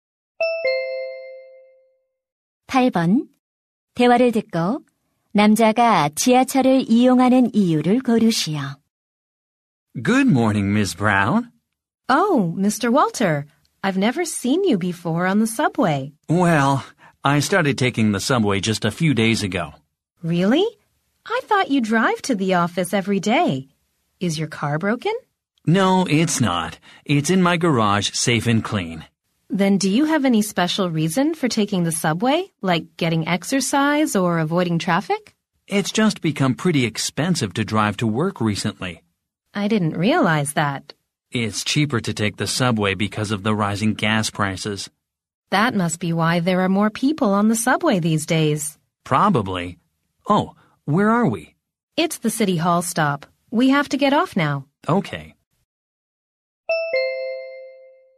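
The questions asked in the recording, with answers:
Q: 대화를 듣고 남자가 지하철을 이용하는 이유를 고르시오.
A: 기름값이 올라 운전 비용이 비싸져서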